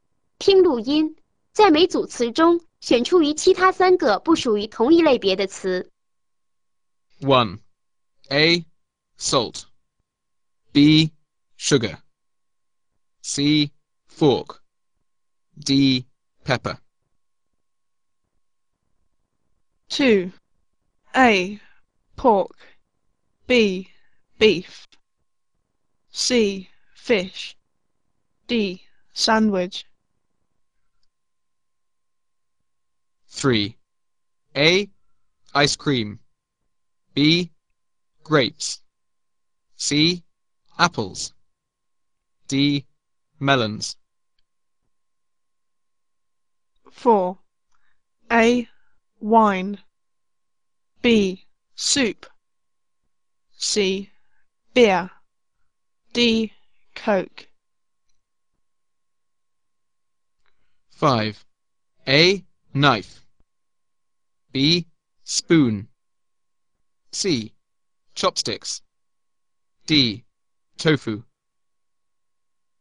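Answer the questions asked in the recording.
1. C: fork
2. D: sandwich
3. A: ice cream
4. B: soup
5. D: tofu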